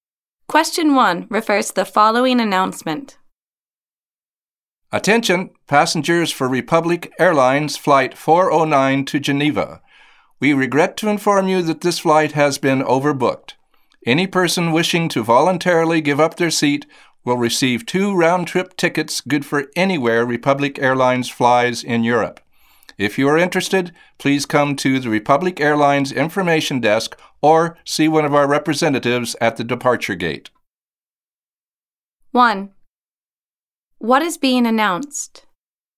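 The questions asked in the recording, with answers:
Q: What is being announced?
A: Flight 409 to Geneva is overbooked, and volunteers who give up their seats will get two round-trip tickets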